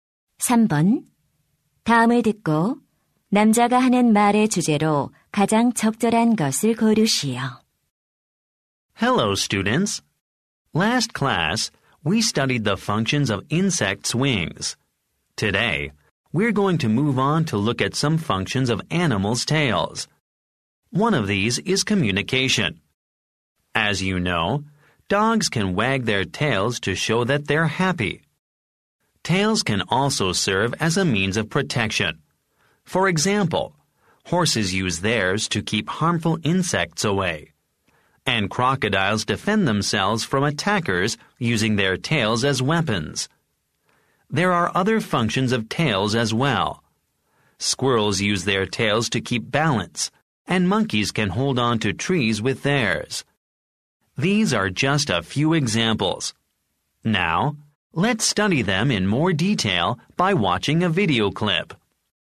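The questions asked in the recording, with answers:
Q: 다음을 듣고 남자가 하는 말의 주제로 가장 적절한 것을 고르시오.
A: 동물 꼬리의 기능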